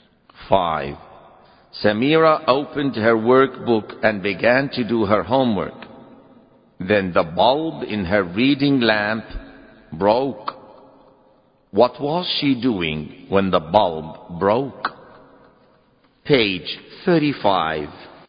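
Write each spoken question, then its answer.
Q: What was she doing when the bulb broke?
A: She was doing her homework.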